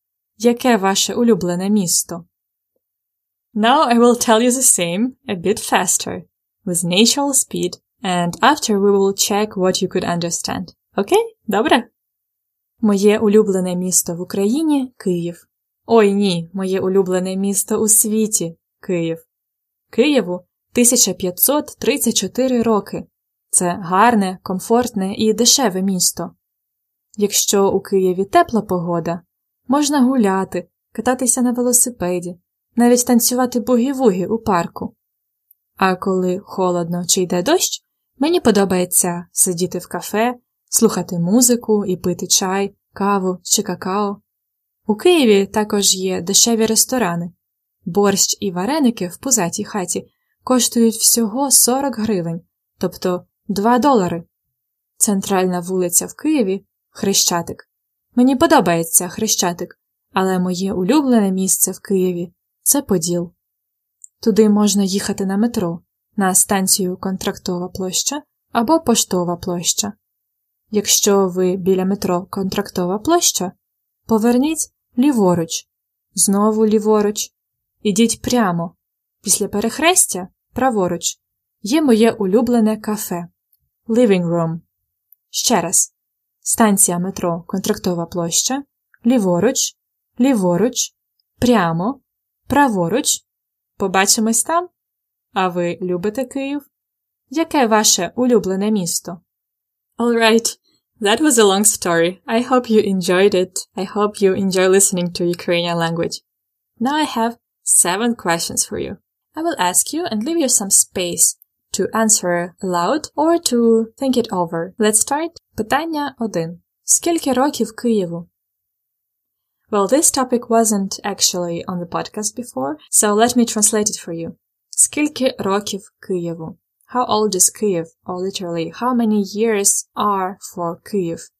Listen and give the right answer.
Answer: Києву 1534 роки.